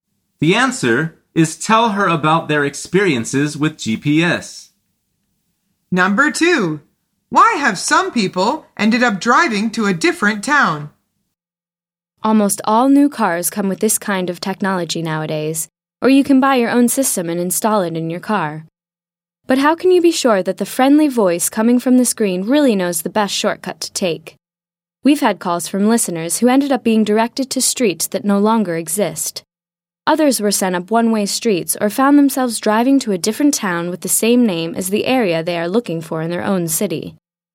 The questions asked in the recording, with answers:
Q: Why have some people ended up driving to a different town?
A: The answer is because it had the same name as the area they were looking for in their own town.